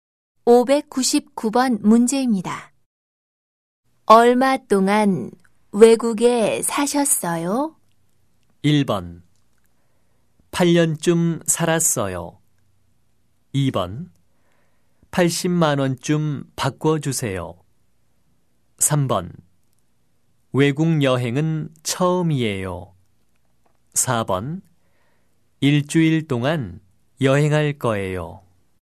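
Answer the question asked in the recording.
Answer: 1: 8년쯤 살았어요.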